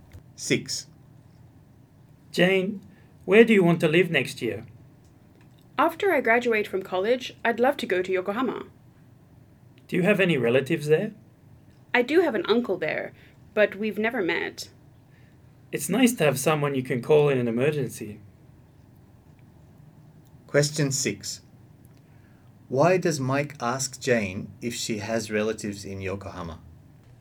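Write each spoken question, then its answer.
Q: Why does Mike ask Jane if she has relatives in Yokohama?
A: Because it's nice to have someone to call in an emergency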